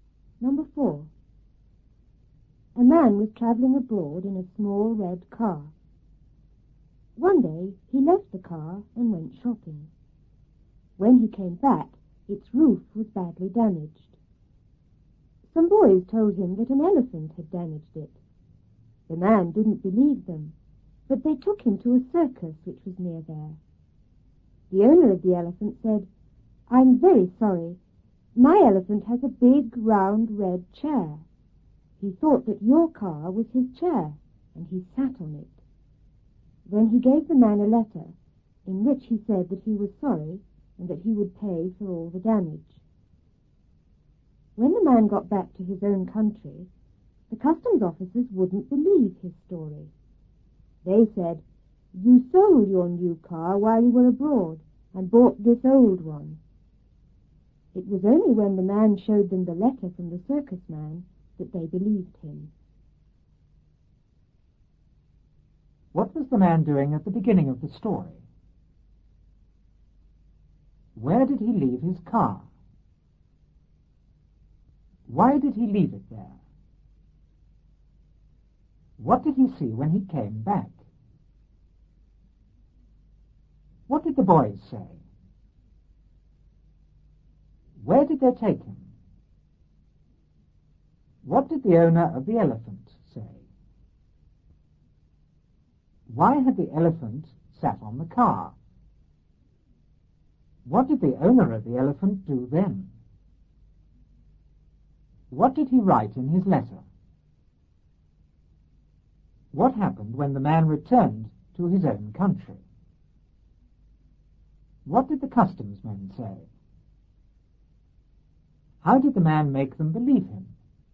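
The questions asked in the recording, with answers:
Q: What was the man doing at the beginning of the story?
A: Traveling abroad in a small red car

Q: Why did he leave it there?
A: To go shopping

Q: What did he see when he came back?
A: The roof was badly damaged

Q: What did the boys say?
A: An elephant had damaged it

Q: Where did they take him?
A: To a circus near there

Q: What did the owner of the elephant say?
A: He was very sorry; his elephant thought the car was its big, round, red chair and sat on it

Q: Why had the elephant sat on the car?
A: It thought the car was its big, round, red chair

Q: What did the owner of the elephant do then?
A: Gave the man a letter

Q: What did he write in his letter?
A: That he was sorry and would pay for all the damage

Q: What happened when the man returned to his own country?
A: The customs officers wouldn't believe his story

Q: What did the customs men say?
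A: That he had sold his new car abroad and bought this old one

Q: How did the man make them believe him?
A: He showed them the letter from the circus man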